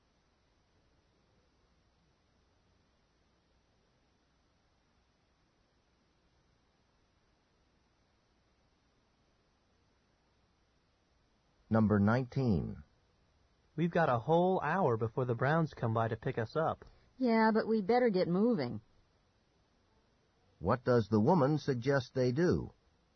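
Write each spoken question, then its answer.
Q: What does the woman suggest they do?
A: Start getting ready now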